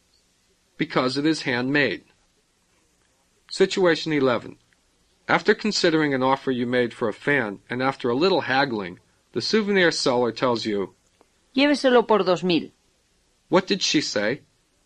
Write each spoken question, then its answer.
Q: What did she say?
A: Take it for 2,000.